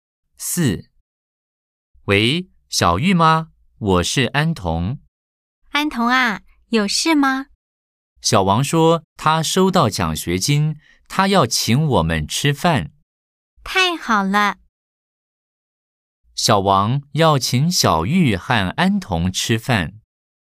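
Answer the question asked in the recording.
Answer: 对 (O)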